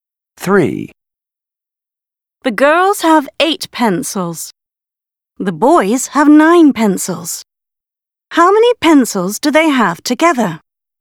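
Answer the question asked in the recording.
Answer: 17 pencils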